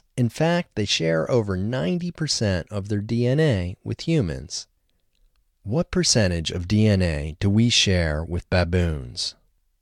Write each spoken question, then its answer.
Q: What percentage of DNA do we share with baboons?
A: We share over 90% of our DNA with baboons.